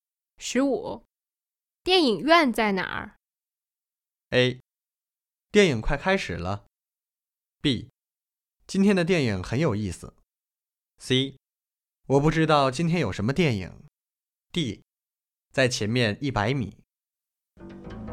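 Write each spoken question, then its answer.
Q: 电影院在哪儿?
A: D: 在前面100米。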